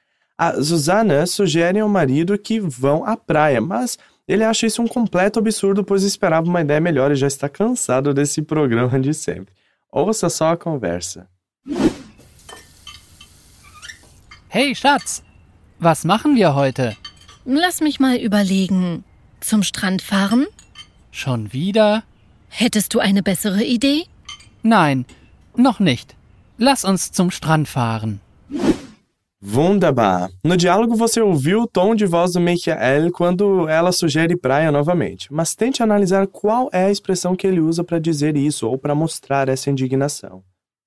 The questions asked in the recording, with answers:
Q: No diálogo você ouviu o tom de voz do Michael quando ela sugere praia novamente, mas tente analisar qual é a expressão que ele usa para dizer isso ou para mostrar essa indignação.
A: Aí o Michael fica indignado com a sugestão e responde: Schon wieder?